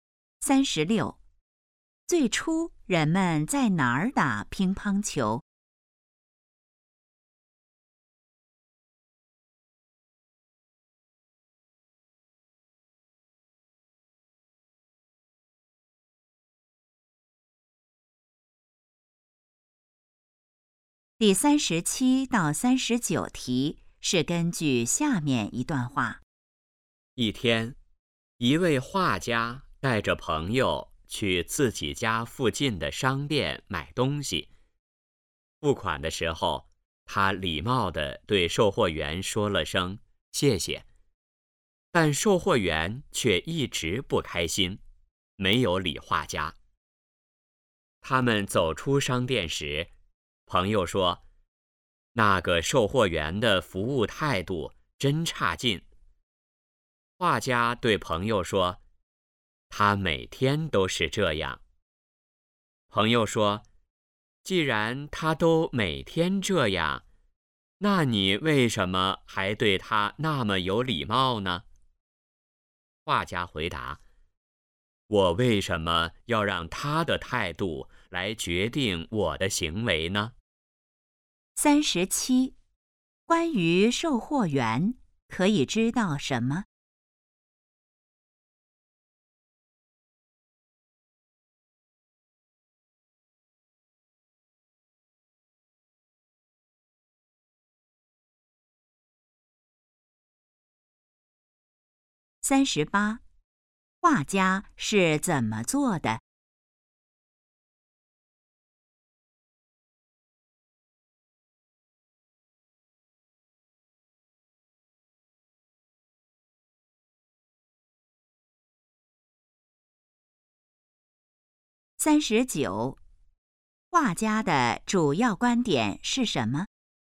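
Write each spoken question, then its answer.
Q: 关于售货员可以知道什么?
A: 服务态度差

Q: 画家是怎么做的?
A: 对售货员很有礼貌

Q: 画家的主要观点是什么?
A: 不让别人的态度决定自己的行为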